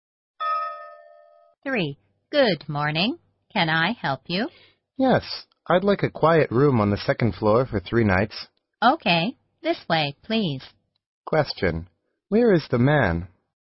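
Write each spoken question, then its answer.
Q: Where is the man?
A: In a hotel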